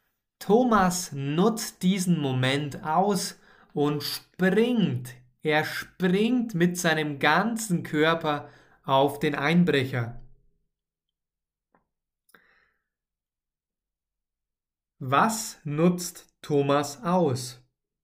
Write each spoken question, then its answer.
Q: Was nutzt Thomas aus?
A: diesen Moment. Thomas nutzt diesen Moment aus.